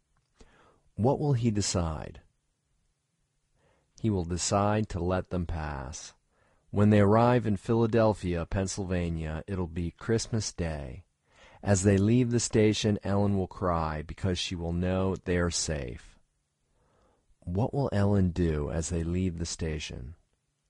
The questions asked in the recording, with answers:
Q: What will Ellen do as they leave the station?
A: Ellen will cry as they leave the station.